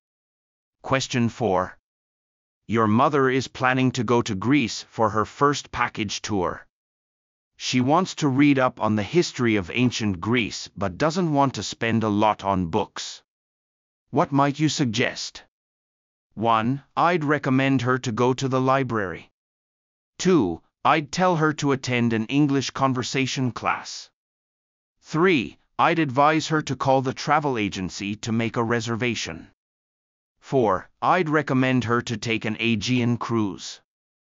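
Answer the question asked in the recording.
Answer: 1: I'd recommend her to go to the library.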